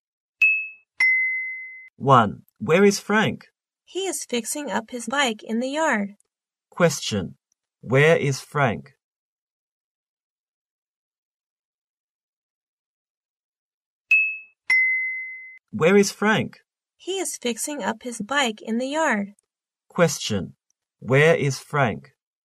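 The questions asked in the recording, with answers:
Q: where is Frank?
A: In the yard, fixing up his bike.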